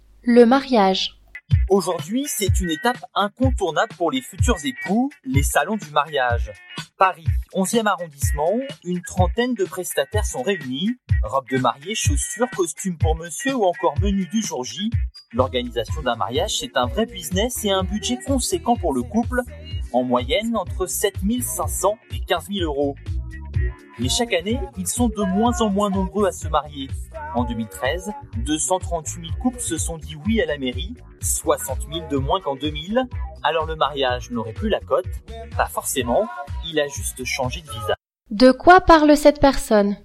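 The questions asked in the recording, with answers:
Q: De quoi parle cette personne?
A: Du mariage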